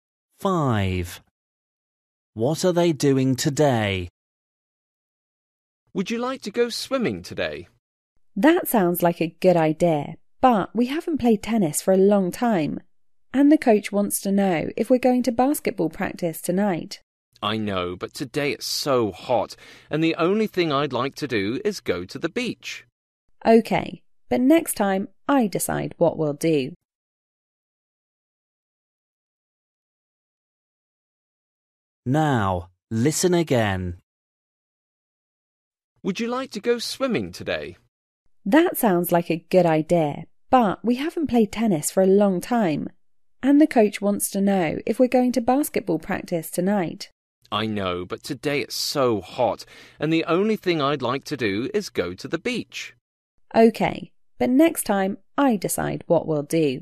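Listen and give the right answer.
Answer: Going swimming at the beach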